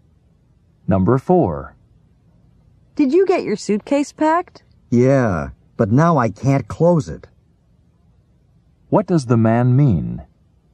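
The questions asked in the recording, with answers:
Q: What does the man mean?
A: His suitcase is too full to close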